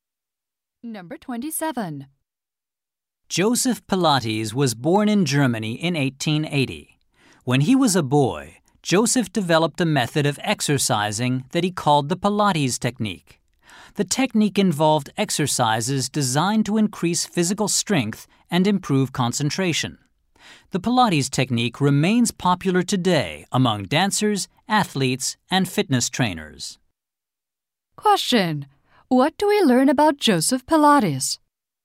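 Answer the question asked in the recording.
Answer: He developed an exercise method when he was a boy.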